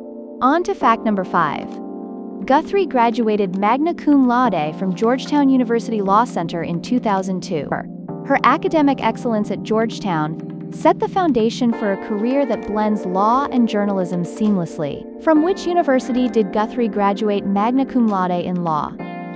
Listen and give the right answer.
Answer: Correct answer, Georgetown University.